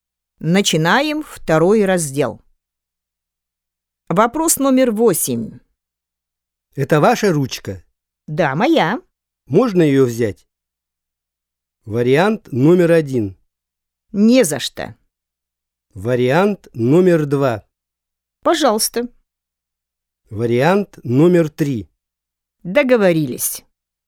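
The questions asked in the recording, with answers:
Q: Можно ее взять?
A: 2: Пожалуйста.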